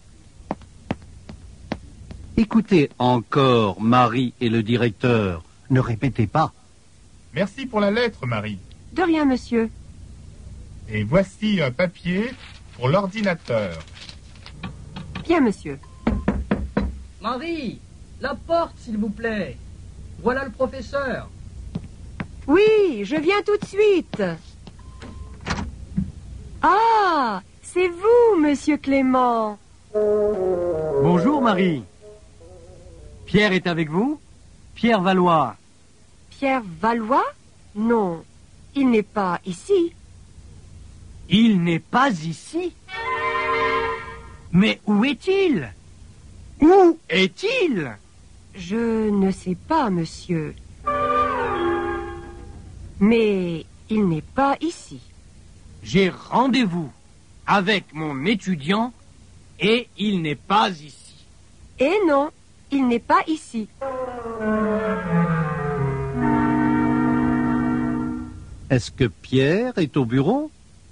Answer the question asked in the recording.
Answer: Non, il n'est pas au bureau.